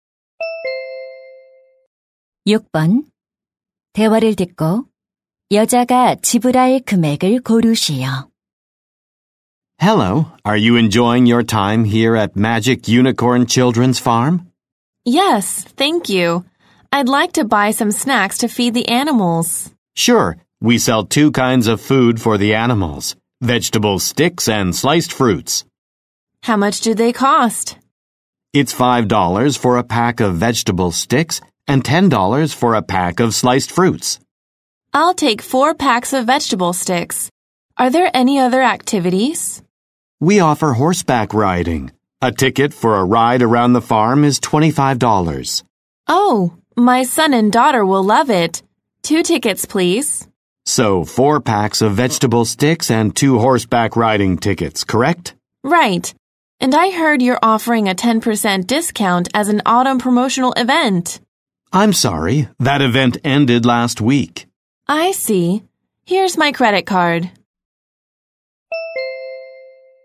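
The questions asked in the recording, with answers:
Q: 대화를 듣고 여자가 지불할 금액을 고르시오.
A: $70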